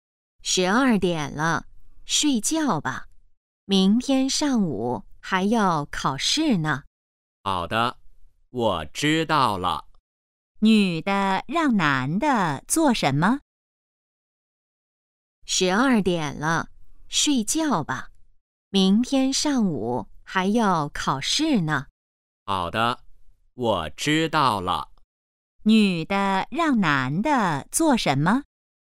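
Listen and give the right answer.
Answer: 睡觉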